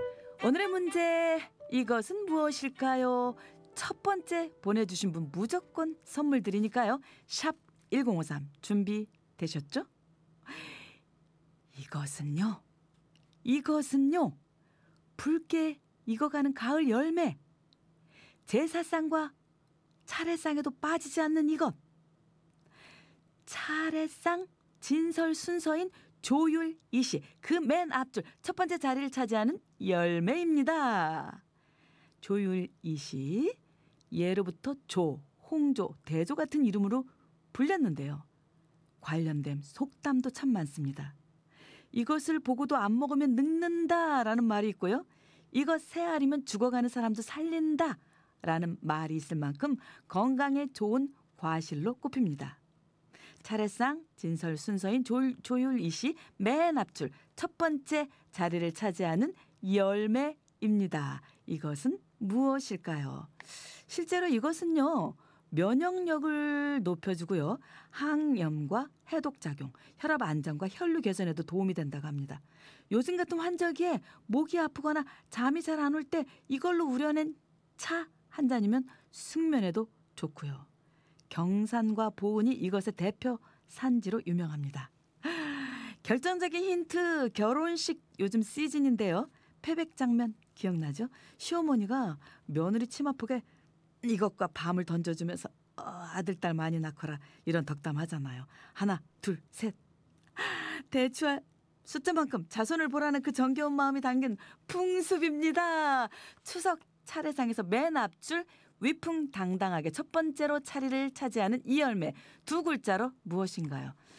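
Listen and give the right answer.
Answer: 대추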